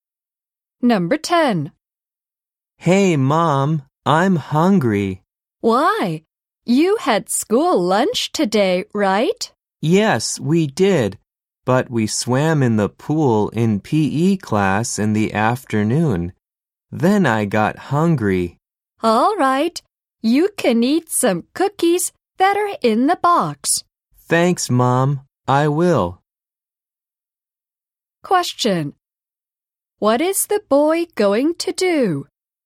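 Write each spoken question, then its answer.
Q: What is the boy going to do?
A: Eat some cookies in the box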